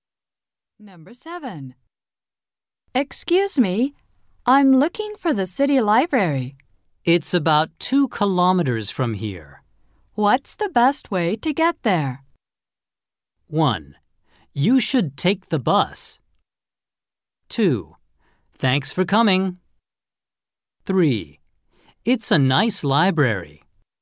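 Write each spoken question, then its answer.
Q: What's the best way to get there?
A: 1: You should take the bus.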